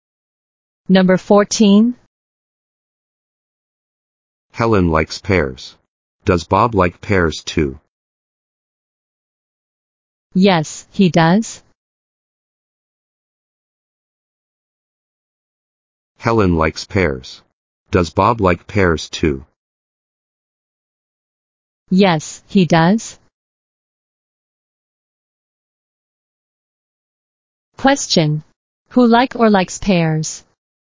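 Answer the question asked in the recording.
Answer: Helen and Bob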